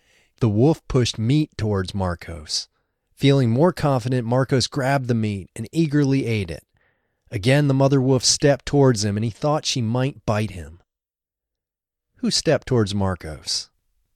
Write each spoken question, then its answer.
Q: Who stepped towards Marcos?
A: The wolf stepped towards Marcos.